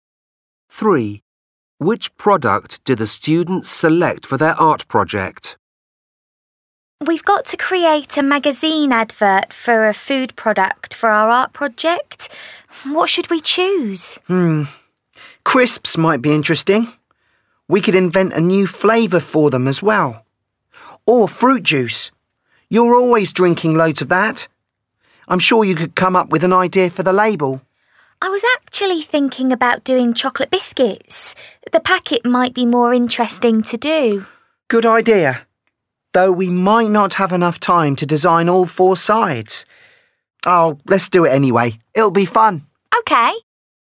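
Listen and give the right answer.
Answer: chocolate biscuits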